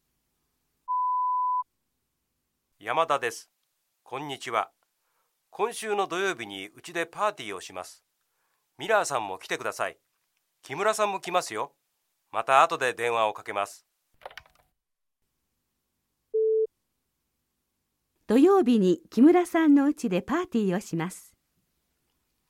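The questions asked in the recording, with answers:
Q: 土曜日に木村さんの家でパーティーをします。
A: ×(山田さんの家)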